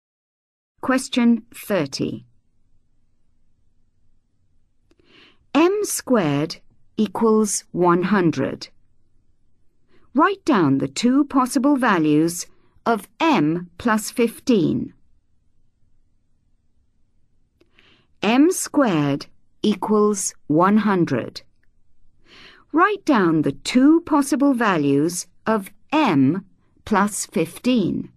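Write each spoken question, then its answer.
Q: Write down the two possible values of M plus 15.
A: 25 and 5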